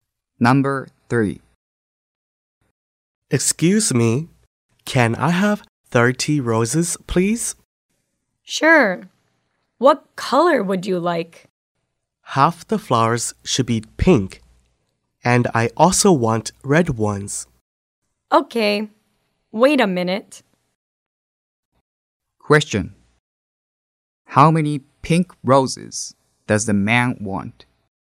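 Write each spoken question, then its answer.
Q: How many pink roses does the man want?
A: 15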